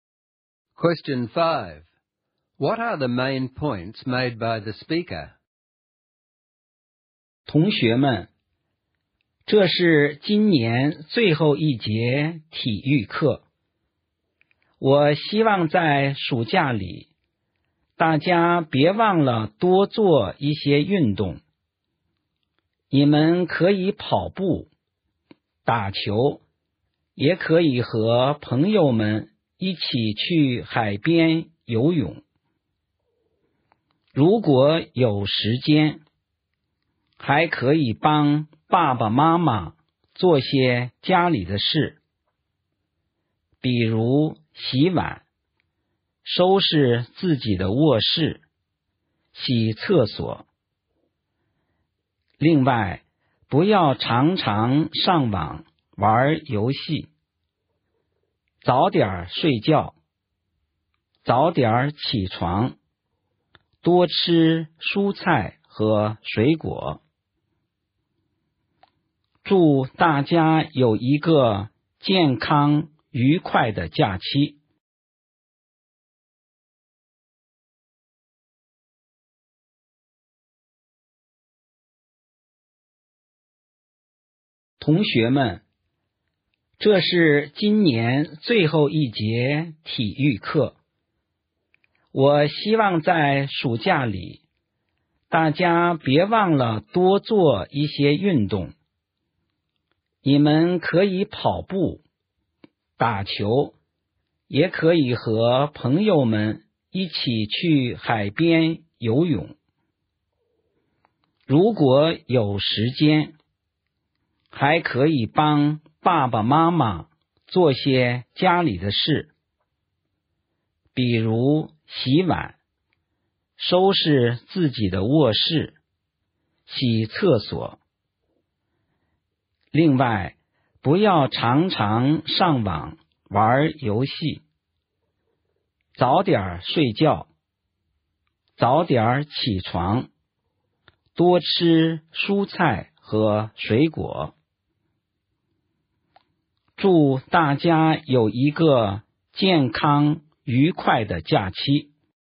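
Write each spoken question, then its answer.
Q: What are the main points made by the speaker?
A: Stay healthy over the summer holiday: do plenty of exercise, help out at home, don't play online games too often, go to bed and get up early, and eat more fruit and vegetables.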